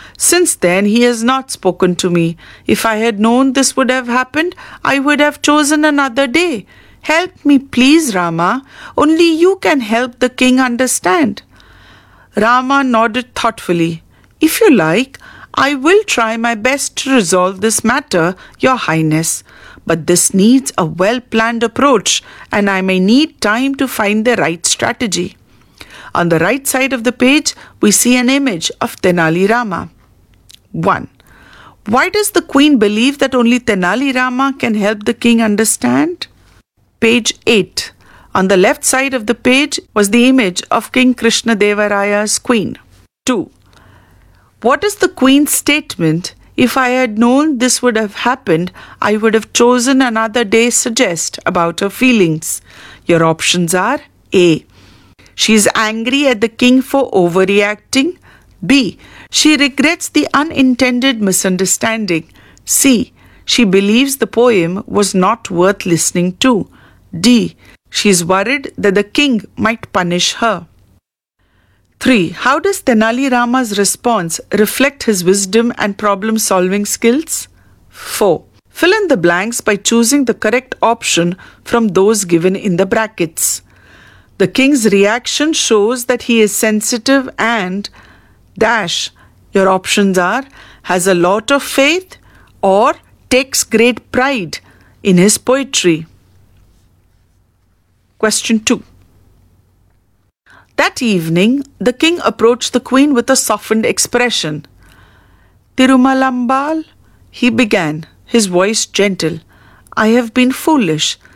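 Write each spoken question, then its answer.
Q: What is the queen's statement, "If I had known this would have happened, I would have chosen another day," suggest about her feelings?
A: B: She regrets the unintended misunderstanding.

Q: The king's reaction shows that he is sensitive and - your options are has a lot of faith or takes great pride in his poetry.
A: takes great pride in his poetry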